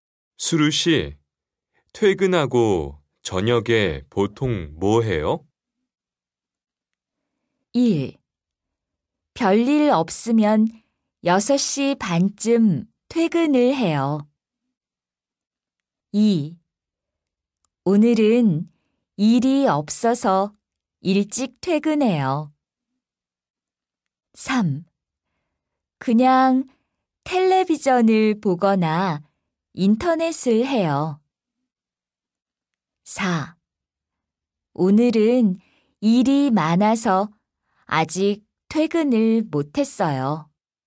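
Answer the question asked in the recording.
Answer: 3: 그냥 텔레비전을 보거나 인터넷을 해요.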